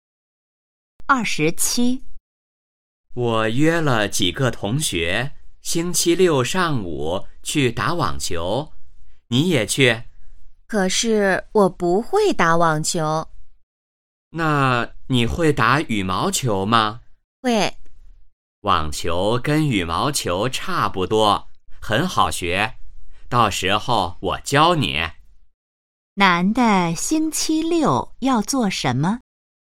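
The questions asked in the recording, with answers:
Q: 男的星期六要做什么?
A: 打网球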